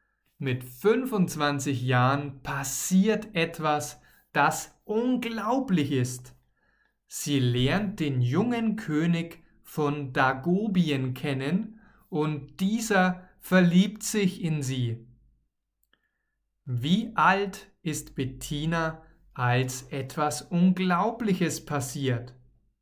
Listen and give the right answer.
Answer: Fünfundzwanzig. Bettina ist fünfundzwanzig Jahre alt.